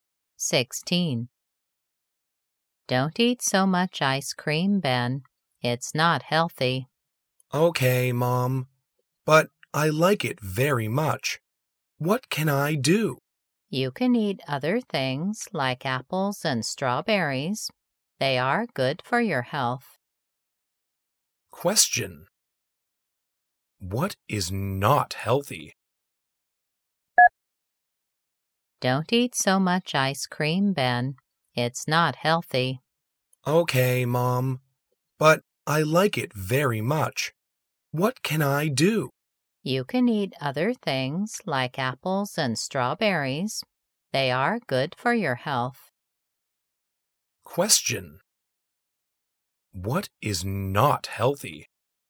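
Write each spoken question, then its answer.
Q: What is not healthy?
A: eating so much ice cream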